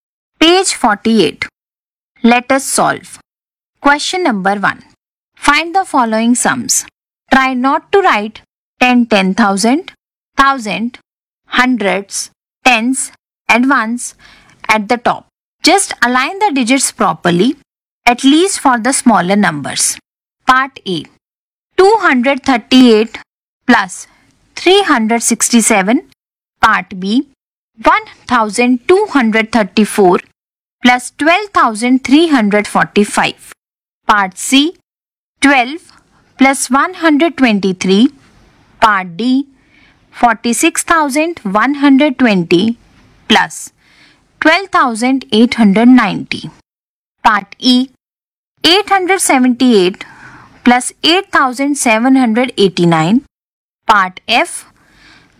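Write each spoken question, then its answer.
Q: 238 plus 367.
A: 605

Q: 1234 plus 12345.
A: 13579

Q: 12 plus 123.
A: 135

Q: 46,120 plus 12,890.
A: 59010

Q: 878 plus 8,789.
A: 9667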